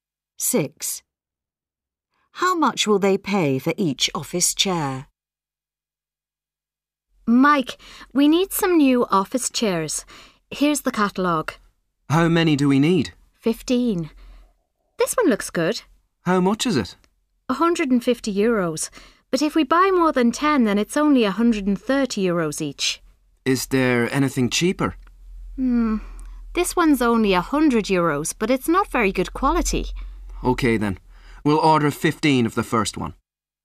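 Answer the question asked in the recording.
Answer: €130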